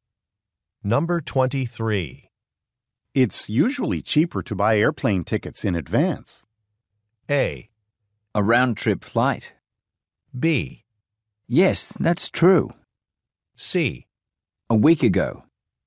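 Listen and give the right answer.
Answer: B: Yes, that's true.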